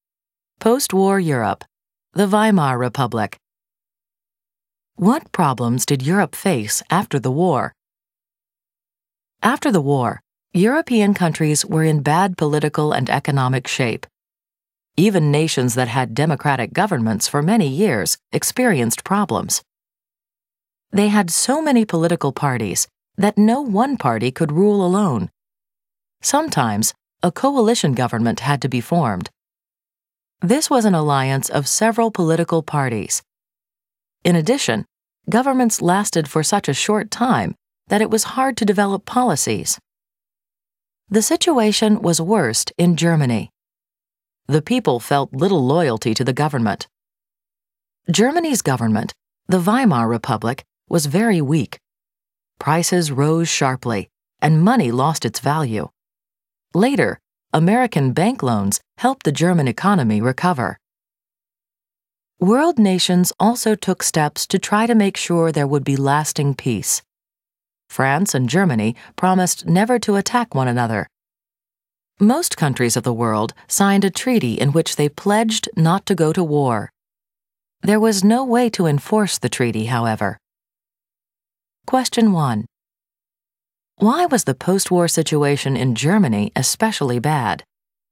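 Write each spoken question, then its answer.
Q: Why was the post-war situation in Germany especially bad?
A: The Weimar government was very weak, people felt little loyalty to it, and prices rose sharply while money lost its value.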